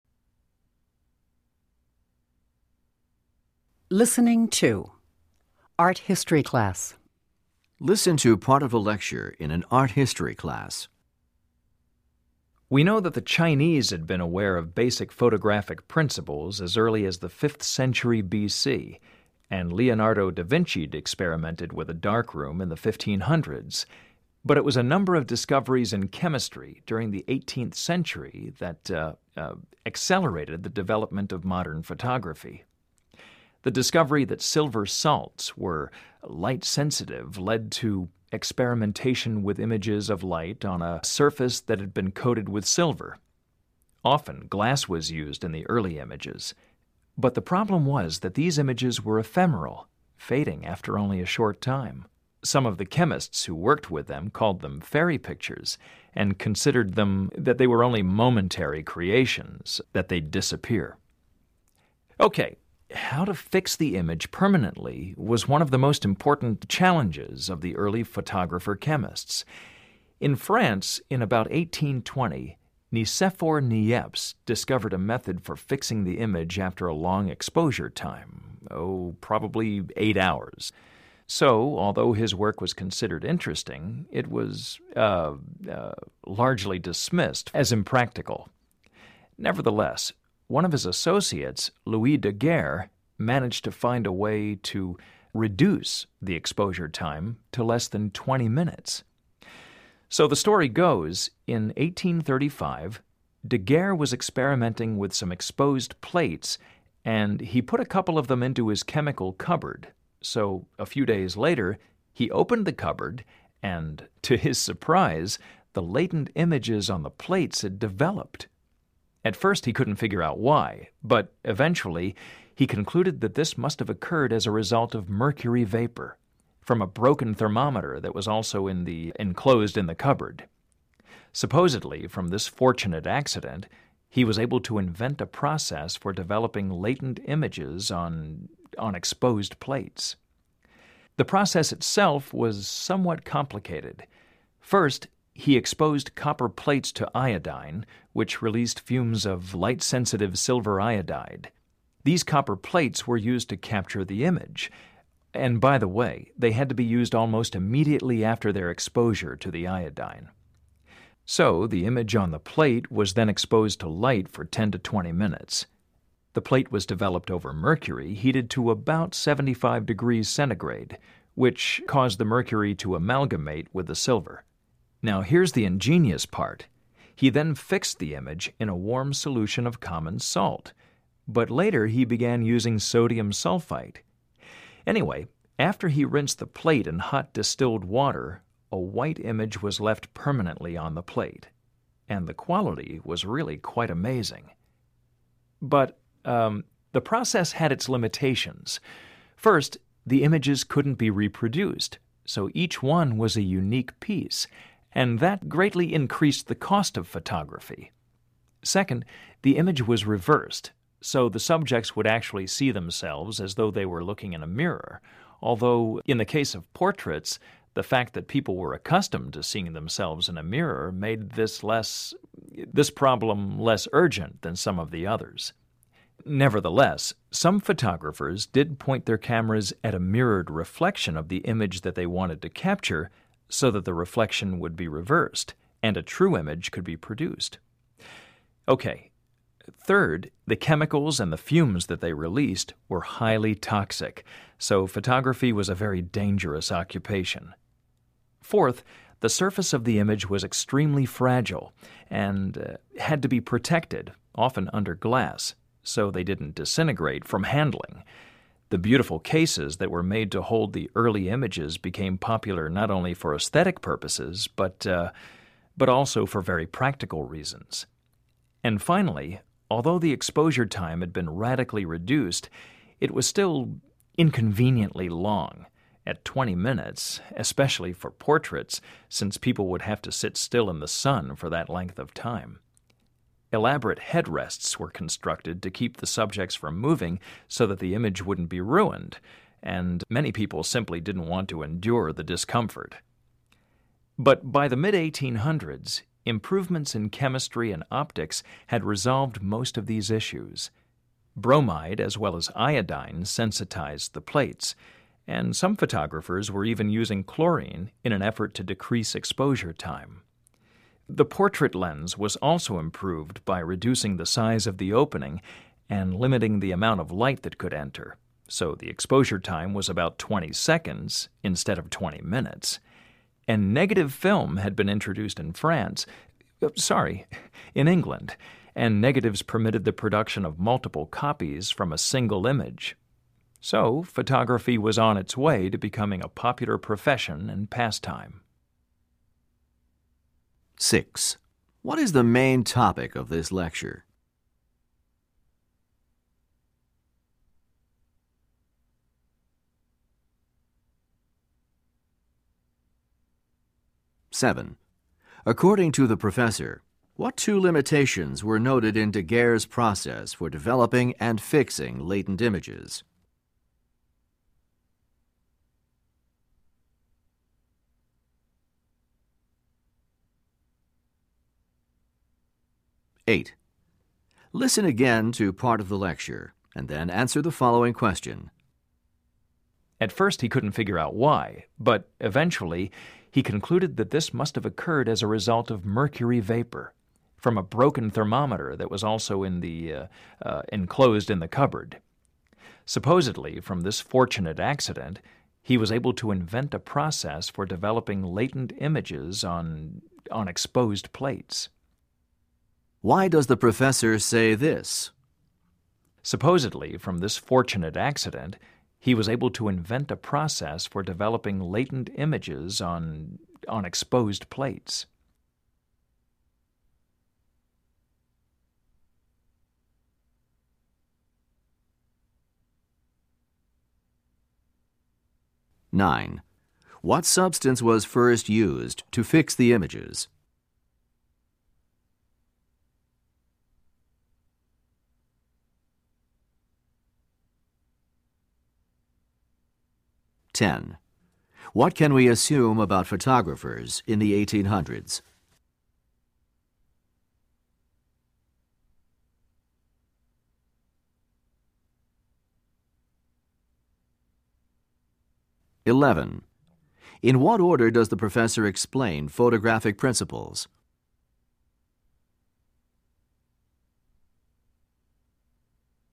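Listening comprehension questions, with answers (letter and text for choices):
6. What is the main topic of this lecture?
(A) The process of fixing a photograph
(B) The problem of exposure time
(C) The experiments by Louis Daguerre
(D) The history of early photography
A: (D) The history of early photography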